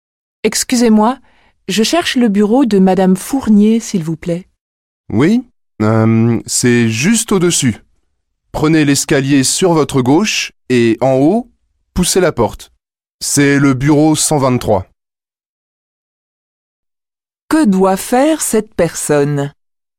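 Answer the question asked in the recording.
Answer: Monter l'escalier à gauche jusqu'au bureau 123.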